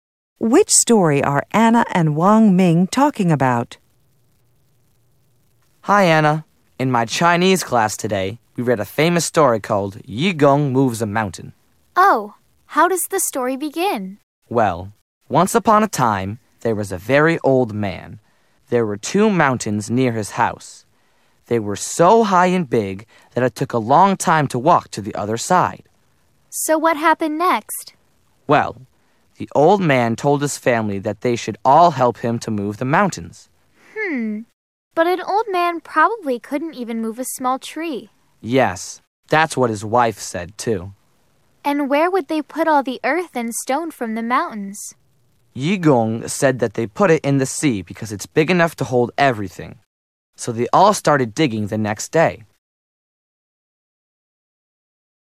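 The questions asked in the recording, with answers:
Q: Which story are Anna and Wang Ming talking about?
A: Yu Gong Moves a Mountain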